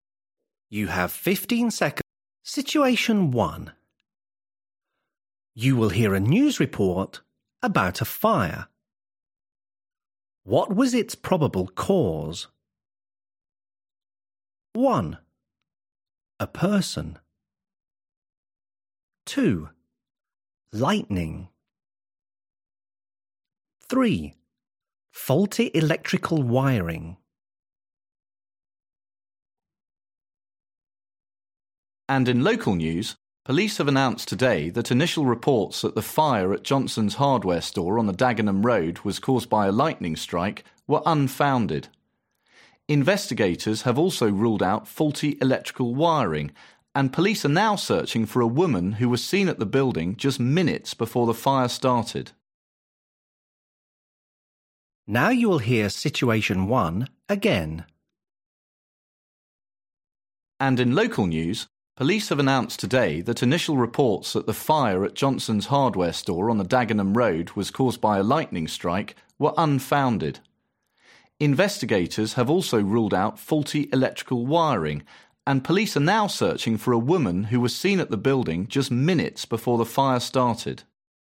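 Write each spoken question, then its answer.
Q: What was its probable cause?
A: 1: A person.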